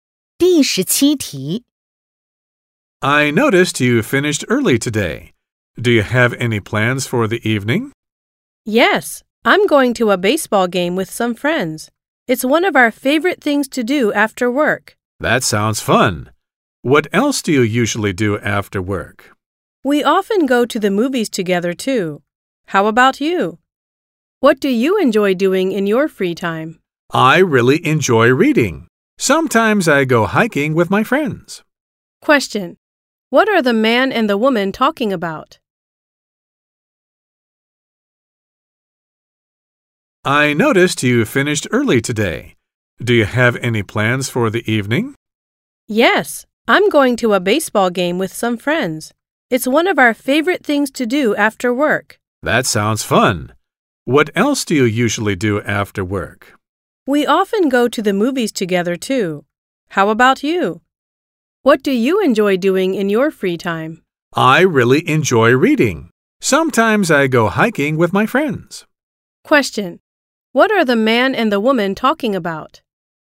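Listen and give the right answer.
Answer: Their free-time activities / what they do after work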